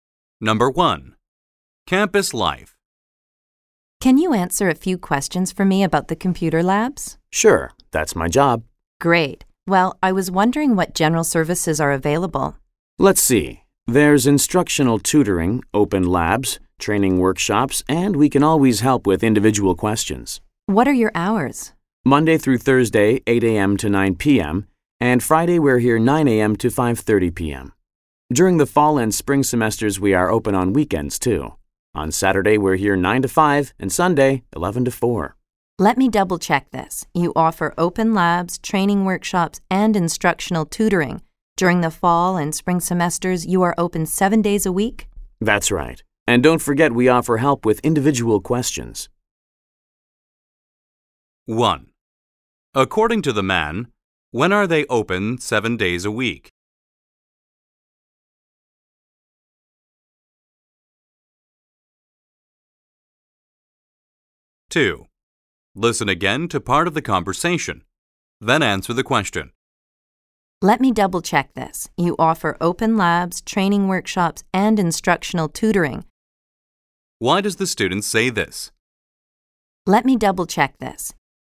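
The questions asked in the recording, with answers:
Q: According to the man, when are they open 7 days a week?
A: During the fall and spring semesters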